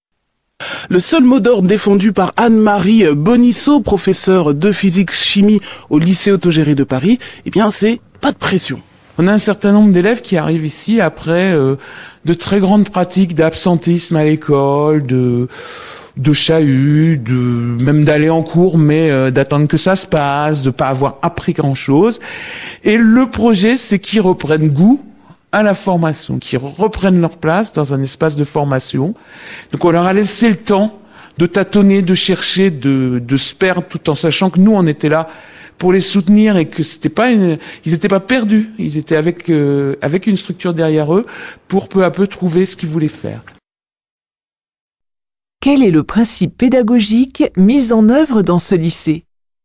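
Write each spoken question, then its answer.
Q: Quel est le principe pédagogique mis en œuvre dans ce lycée ?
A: Pas de pression : on laisse aux élèves le temps de tâtonner et de chercher, avec le soutien des professeurs, pour qu'ils reprennent goût à la formation.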